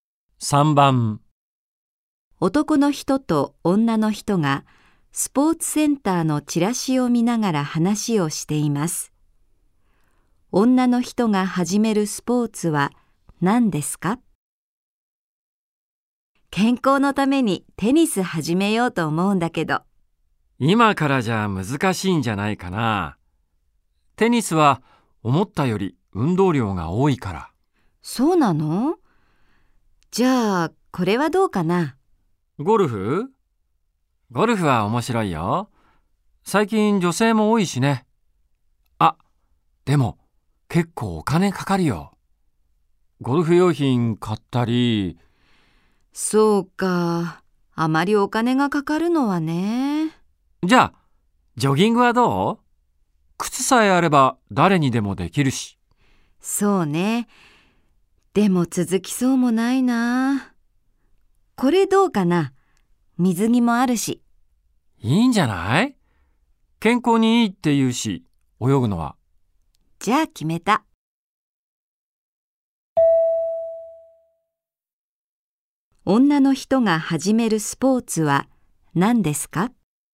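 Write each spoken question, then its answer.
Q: 女の人が始めるスポーツは何ですか?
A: 水泳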